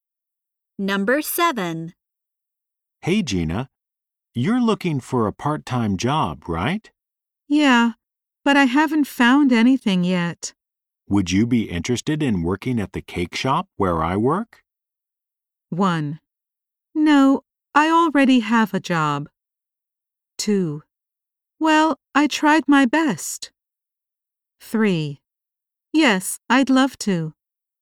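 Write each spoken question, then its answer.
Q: Would you be interested in working at the cake shop where I work?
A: 3: Yes, I'd love to.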